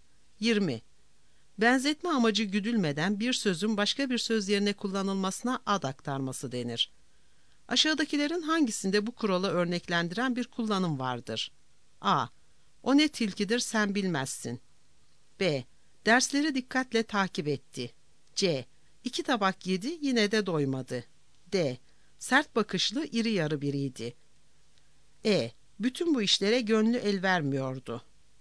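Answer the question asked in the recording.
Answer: C: İki tabak yedi yine de doymadı.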